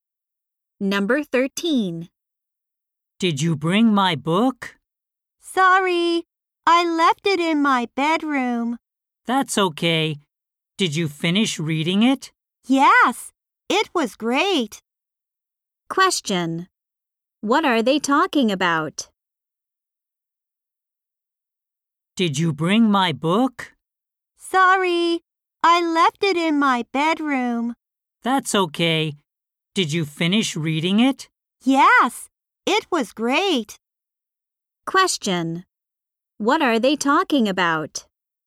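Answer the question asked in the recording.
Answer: A book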